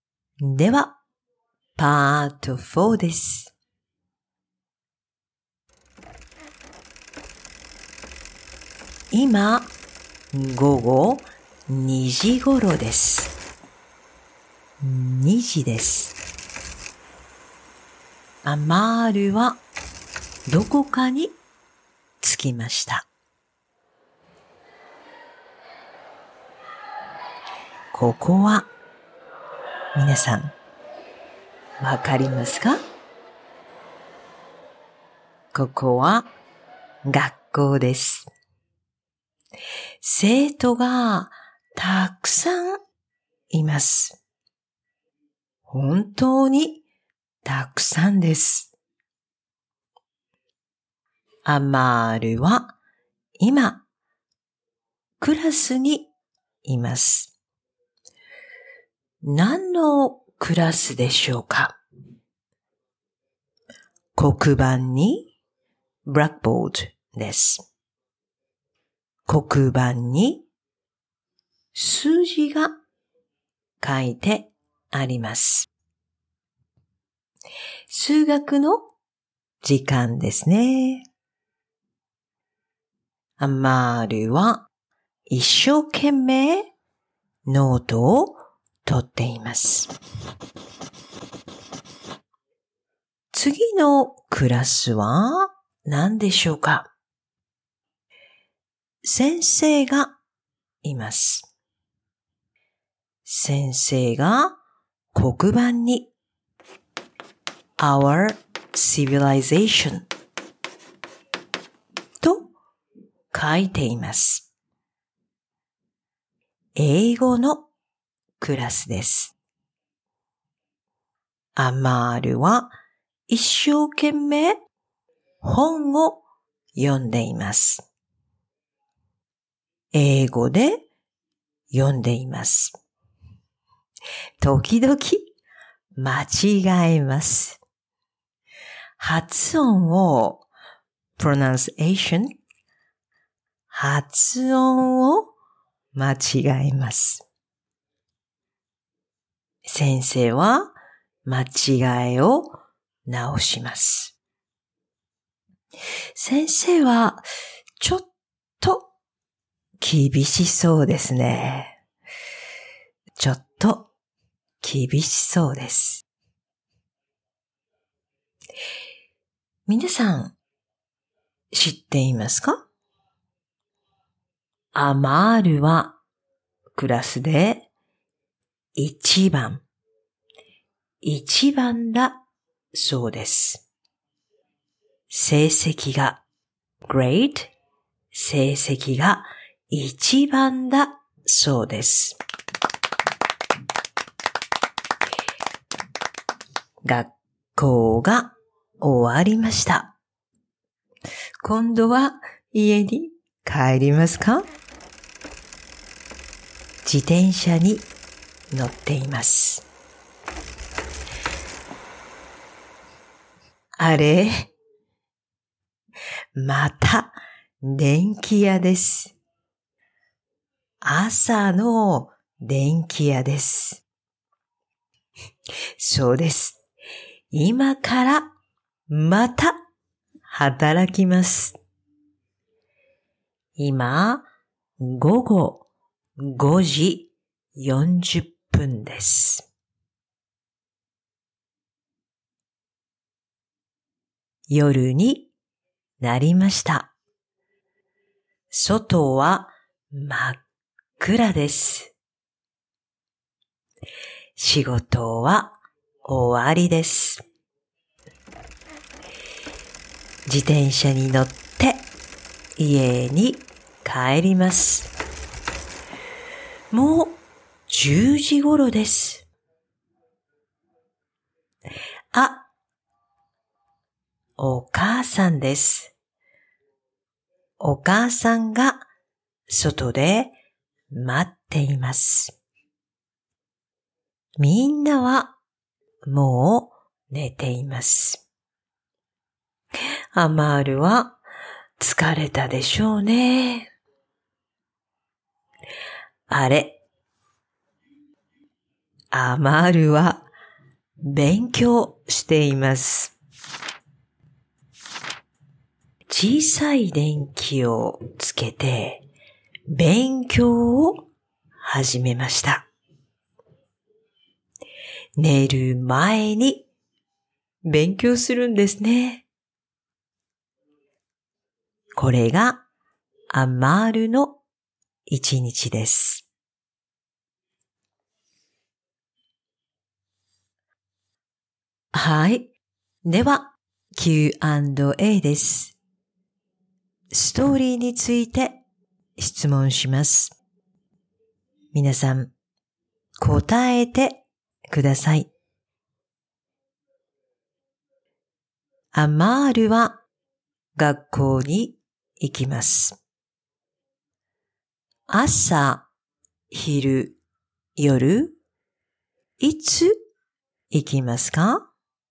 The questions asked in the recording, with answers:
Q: アマールは学校に行きます。 朝、昼、夜、いつ行きますか?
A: 昼です。昼、学校に行きます。